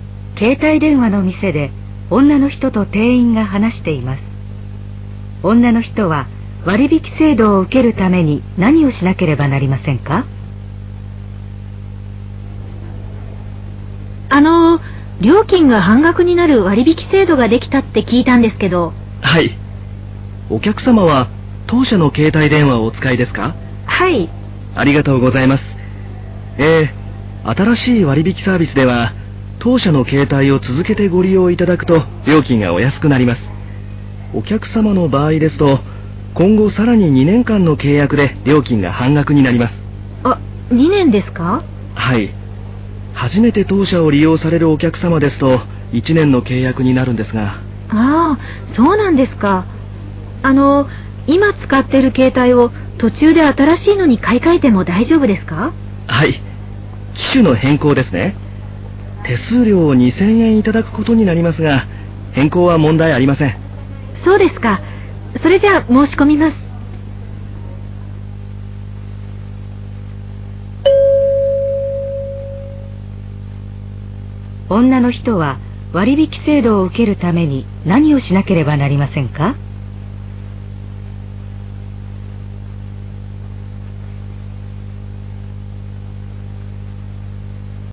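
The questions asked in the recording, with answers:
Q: 女の人は割引制度を受けるために何をしなければなりませんか?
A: 今後さらに2年間の契約をする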